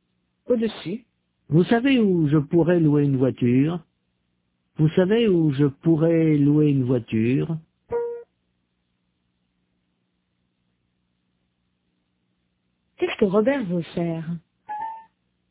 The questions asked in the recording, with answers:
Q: Qu'est-ce que Robert veut faire?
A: Louer une voiture.